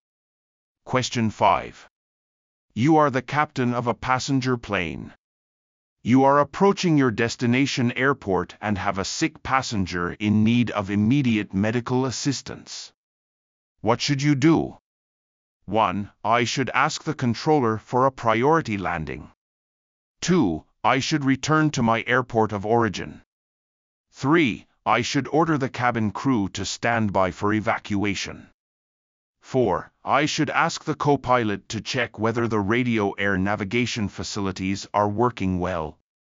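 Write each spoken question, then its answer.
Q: What should you do?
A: 1: I should ask the controller for a priority landing.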